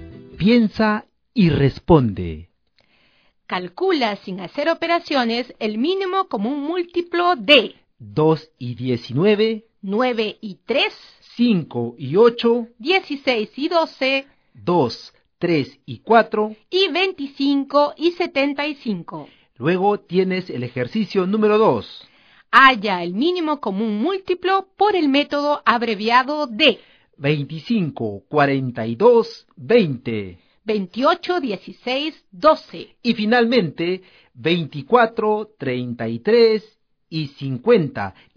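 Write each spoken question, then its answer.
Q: 2 y 19,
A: 38

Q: 16 y 12,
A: 48

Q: 2, 3 y 4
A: 12

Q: y 25 y 75.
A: 75

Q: 25, 42, 20,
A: 2100

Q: 28, 16, 12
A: 336

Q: y finalmente 24, 33 y 50.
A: 6600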